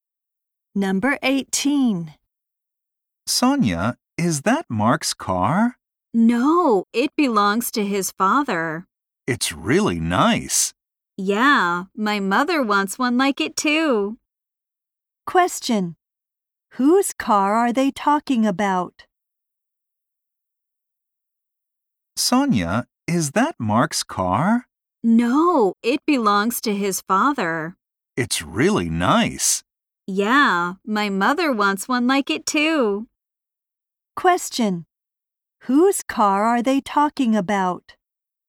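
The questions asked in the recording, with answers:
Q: Whose car are they talking about?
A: Mark's father's.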